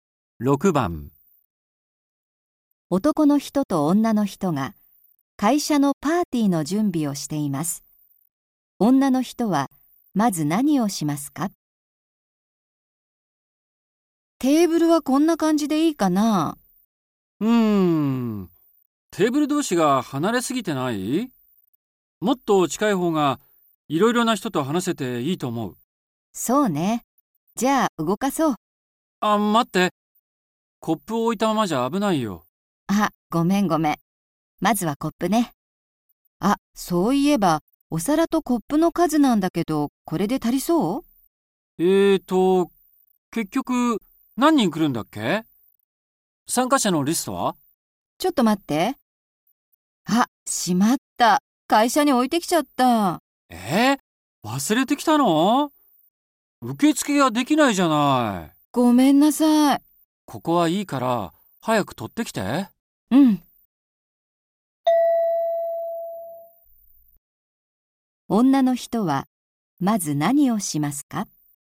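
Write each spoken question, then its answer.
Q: 女の人はまず何をしますか?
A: 会社に参加者のリストを取りに行く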